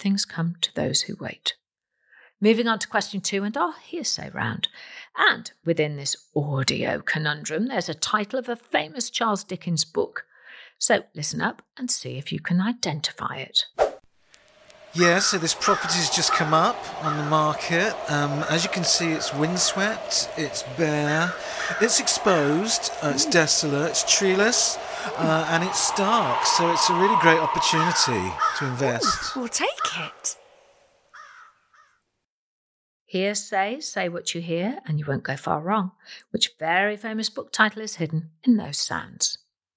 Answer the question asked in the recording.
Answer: Well, the Charles Dickens book was Bleak House.